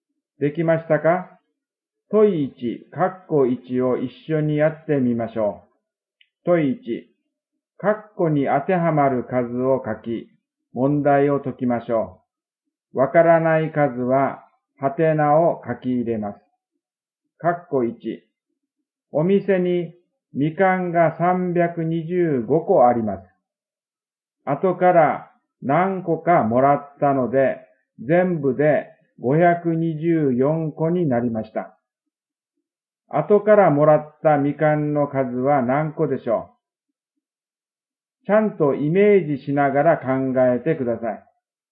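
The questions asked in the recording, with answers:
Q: 後からもらったみかんの数は何個でしょう?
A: 199個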